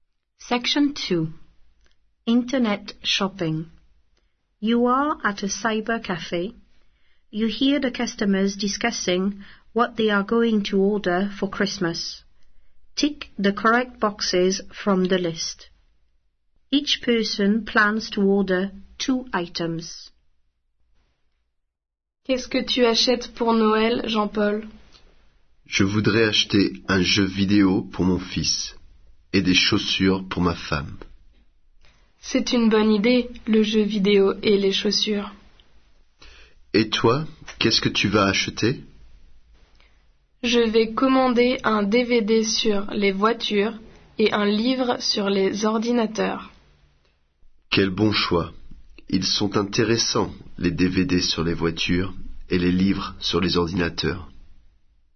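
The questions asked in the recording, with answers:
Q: You hear the customers discussing what they are going to order for Christmas.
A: Jean-Paul: video game and shoes; other: DVD about cars and book about computers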